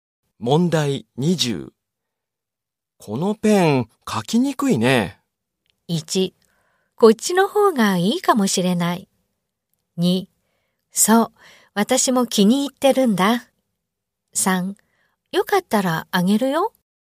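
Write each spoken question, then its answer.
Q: このペン、書きにくいね。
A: 2: こっちの方がいいかもしれない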